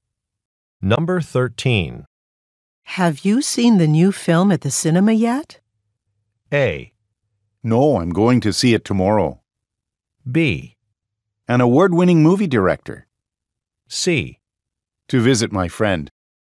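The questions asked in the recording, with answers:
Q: Have you seen the new film at the cinema yet?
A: A: No, I'm going to see it tomorrow.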